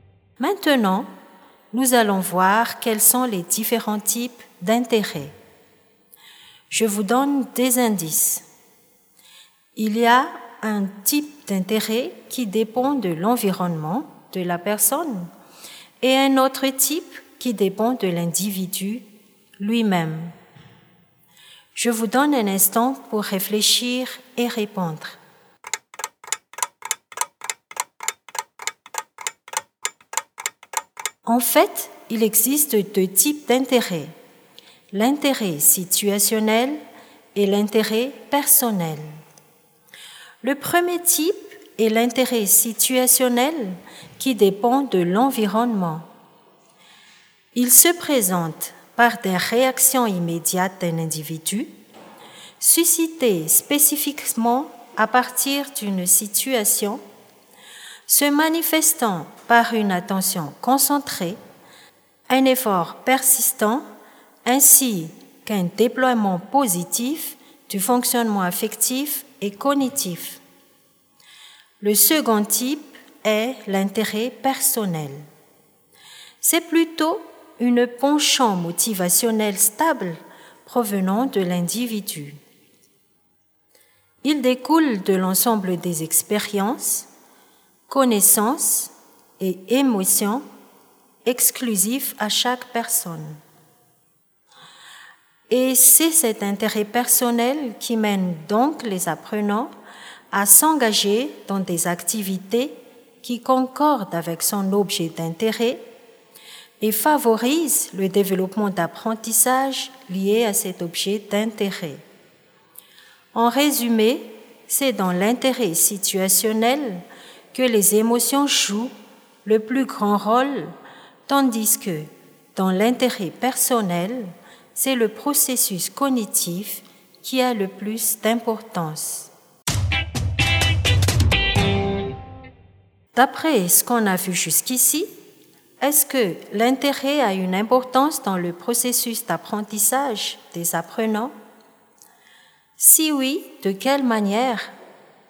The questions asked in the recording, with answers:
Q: D'après ce qu'on a vu jusqu'ici, est-ce que l'intérêt a une importance dans le processus d'apprentissage des apprenants?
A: La réponse est oui, vous avez vu juste.